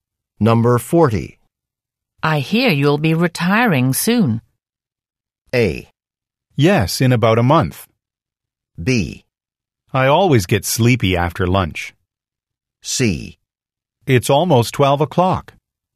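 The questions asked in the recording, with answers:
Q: I hear you'll be retiring soon.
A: A: Yes, in about a month.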